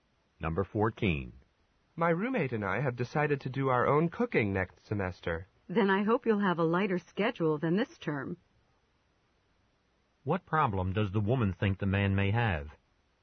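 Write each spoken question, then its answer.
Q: What problem does the woman think the man may have?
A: He may not have enough time to cook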